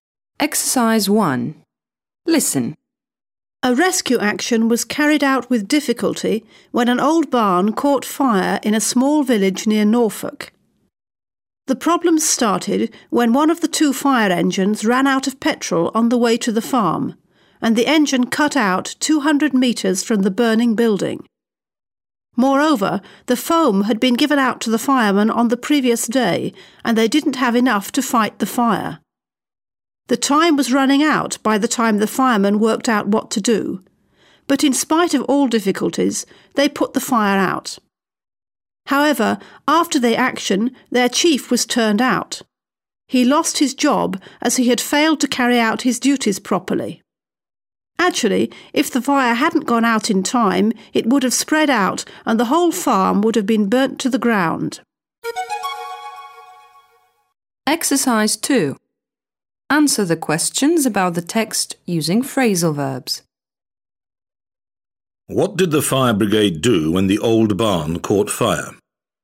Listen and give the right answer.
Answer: They carried out a rescue action.